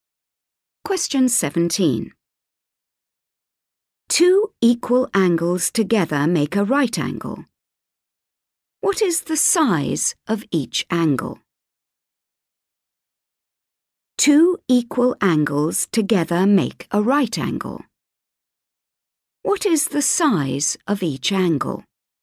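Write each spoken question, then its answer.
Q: What is the size of each angle?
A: 45 degrees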